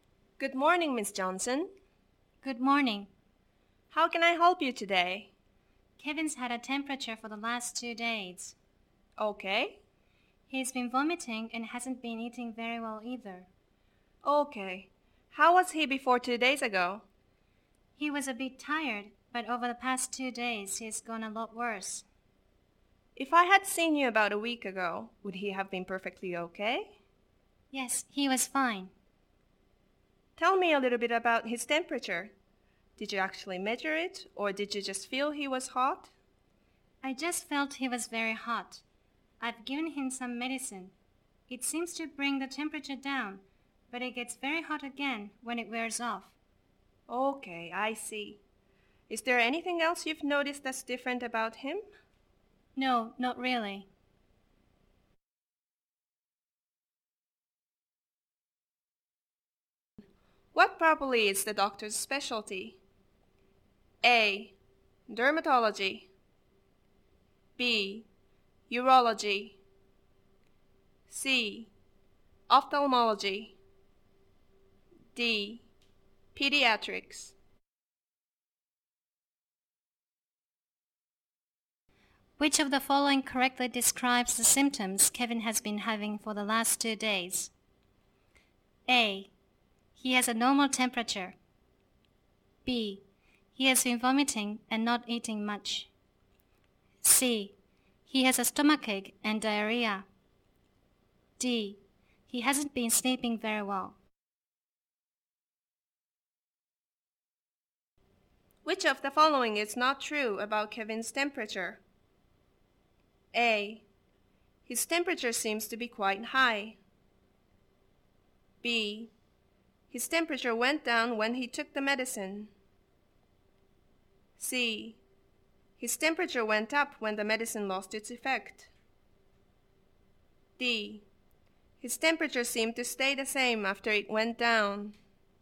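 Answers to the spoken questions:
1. D: Pediatrics.
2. B: He has been vomiting and not eating much.
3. D: His temperature seemed to stay the same after it went down.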